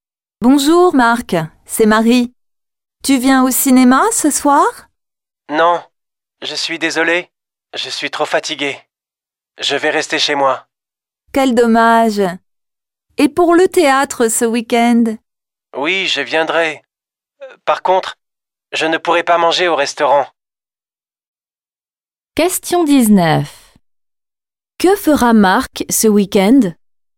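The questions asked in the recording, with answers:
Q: Que fera Marc ce week-end?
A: Il ira au théâtre (mais il ne mangera pas au restaurant).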